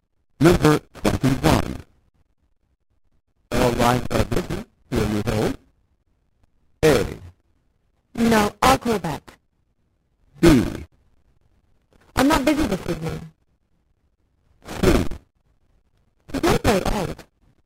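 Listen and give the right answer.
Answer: A: No, I'll call back.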